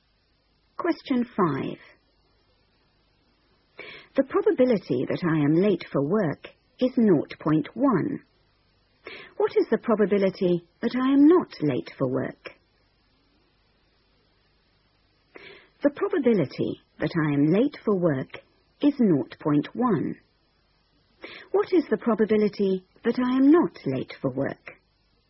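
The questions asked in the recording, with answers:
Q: What is the probability that I am not late for work?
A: 0.9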